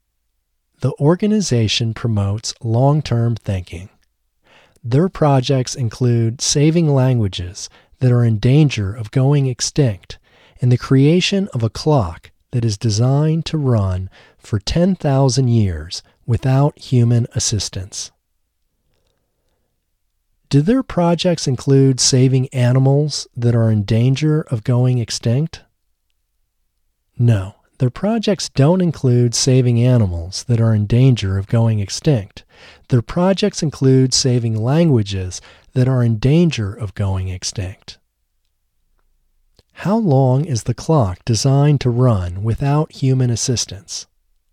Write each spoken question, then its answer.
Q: How long is the clock designed to run without human assistance?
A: The clock is designed to run for 10,000 years without human assistance.